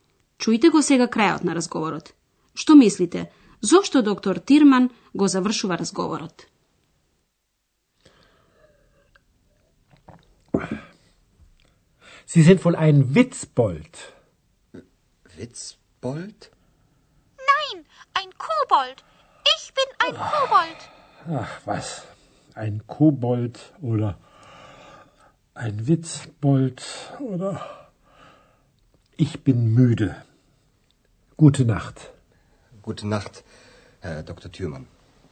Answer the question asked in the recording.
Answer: Значи, доктор Тирман го завршува разговорот, бидејќи е уморен.